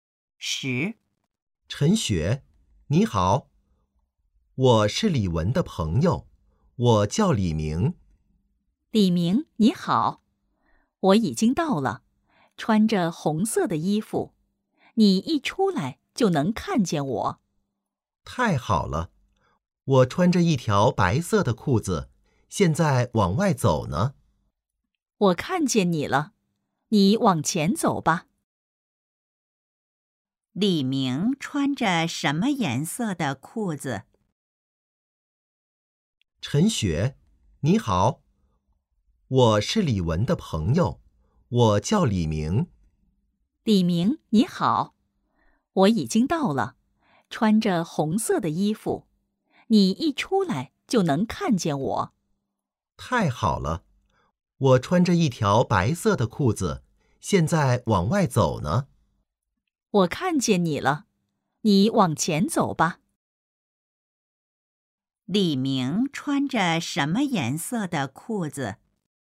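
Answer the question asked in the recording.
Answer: 白色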